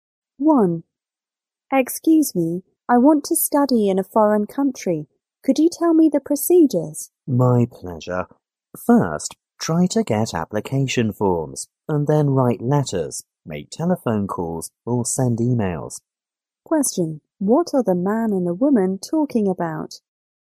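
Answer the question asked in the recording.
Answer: How to apply to study abroad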